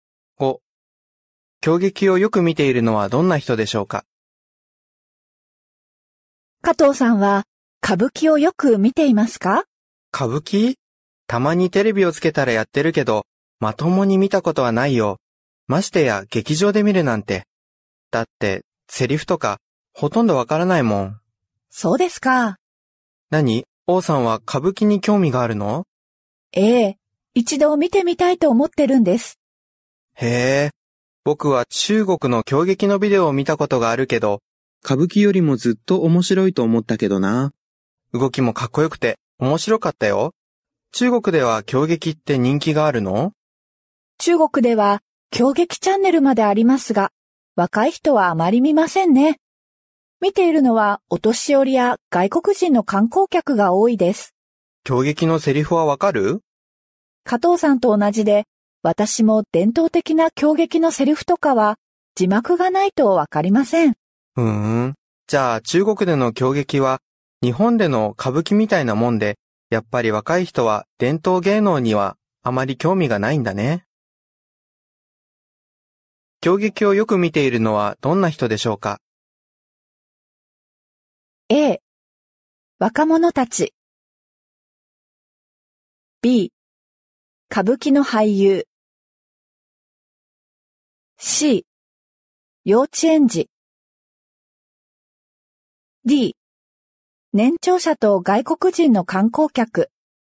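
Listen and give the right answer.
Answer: D: 年長者と外国人の観光客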